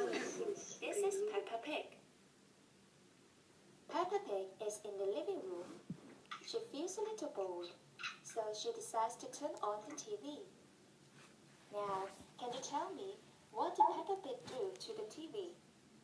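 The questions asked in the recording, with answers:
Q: Now, can you tell me, what did Peppa Pig do to the TV?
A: She turned on the TV.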